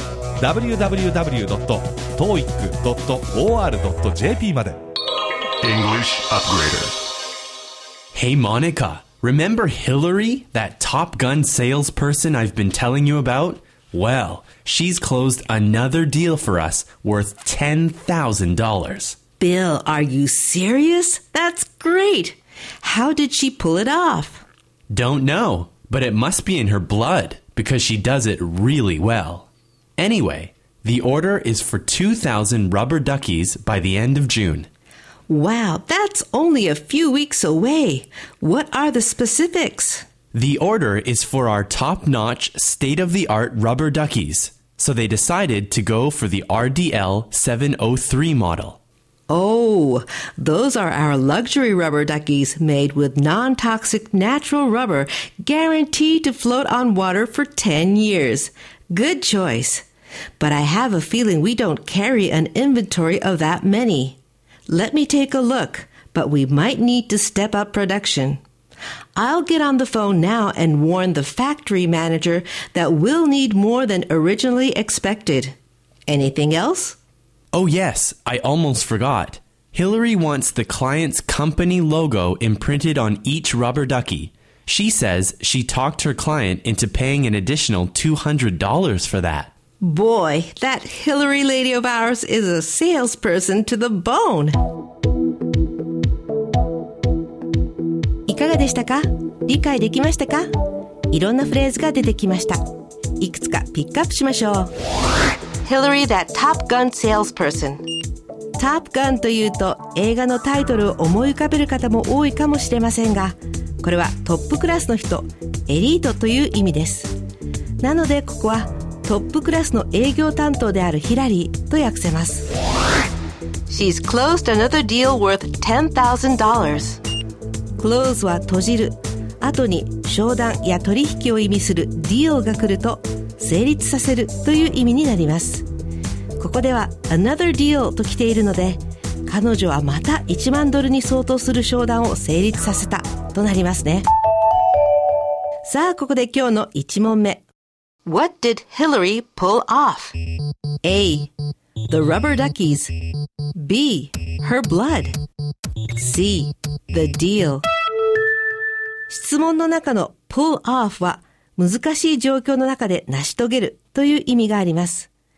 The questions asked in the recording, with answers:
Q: What did Hillary pull off?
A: 彼女は商談を成立させたので正解は C. The deal ですね。